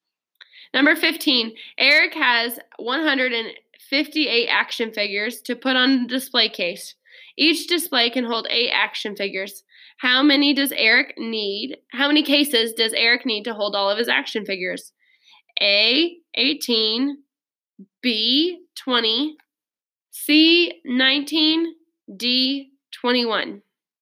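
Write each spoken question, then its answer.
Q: How many cases does Eric need to hold all of his action figures?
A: B: 20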